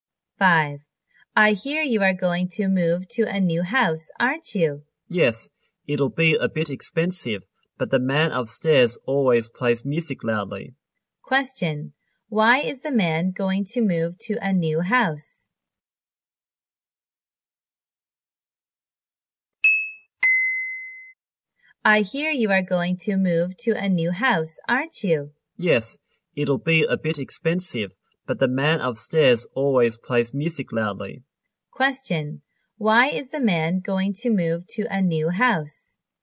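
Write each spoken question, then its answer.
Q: Why is the man going to move to a new house?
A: Because the man upstairs always plays music loudly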